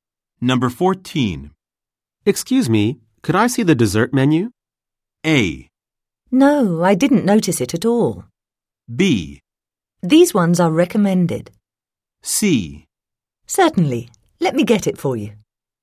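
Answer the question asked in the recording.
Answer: C: Certainly. Let me get it for you.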